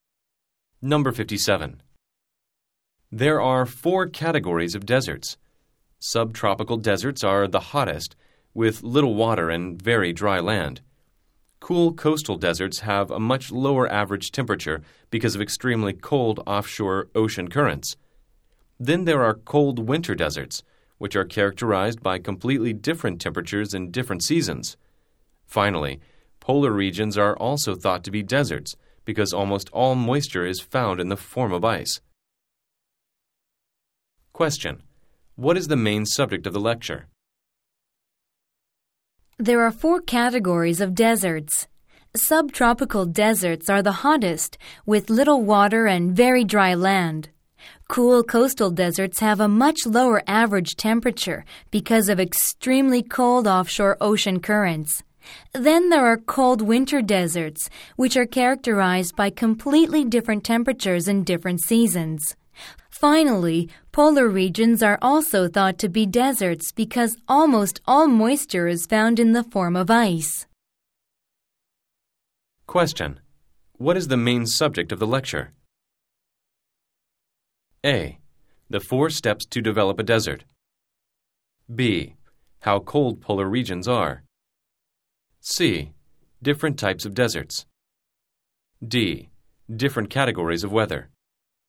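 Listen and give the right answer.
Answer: C: Different types of deserts.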